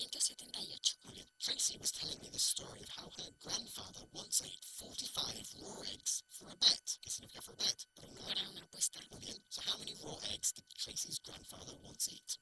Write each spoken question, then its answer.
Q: So how many raw eggs did Tracy's grandfather once eat?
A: 45.